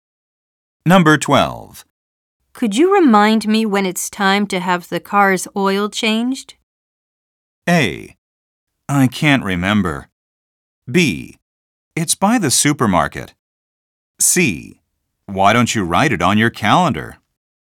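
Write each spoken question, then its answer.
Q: Could you remind me when it's time to have the car's oil changed?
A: C: Why don't you write it on your calendar?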